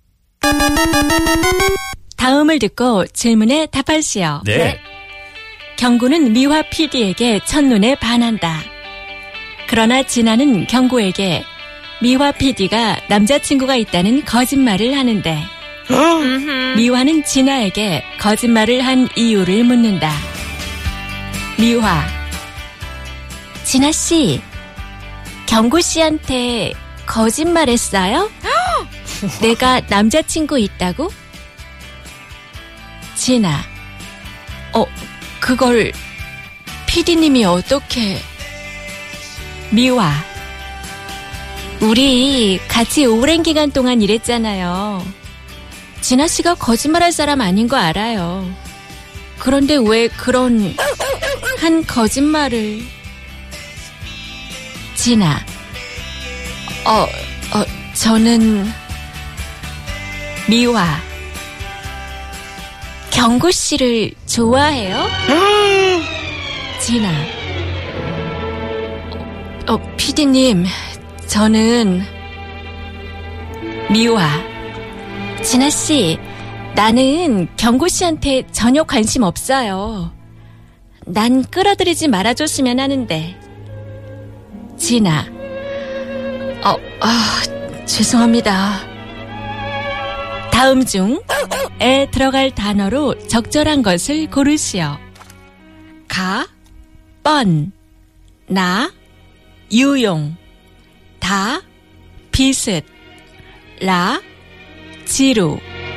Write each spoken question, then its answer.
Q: 다음 중에 들어갈 단어로 적절한 것을 고르시오.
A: Ka, bun, obvious.